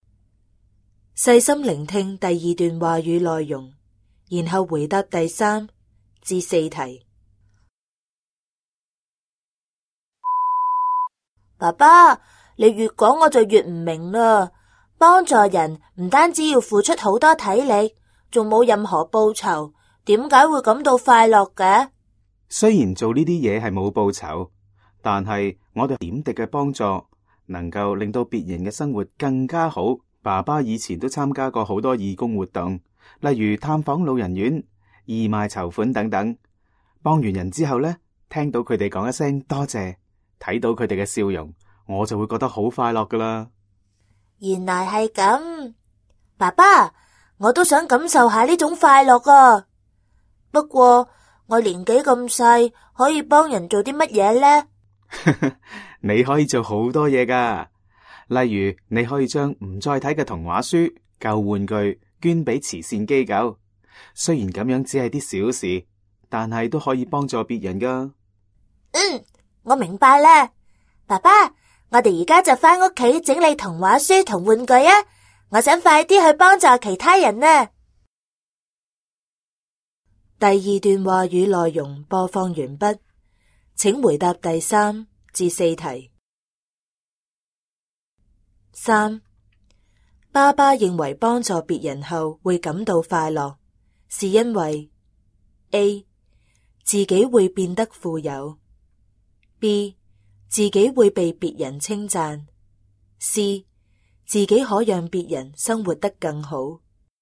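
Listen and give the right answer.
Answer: C: 自己可让别人生活得更好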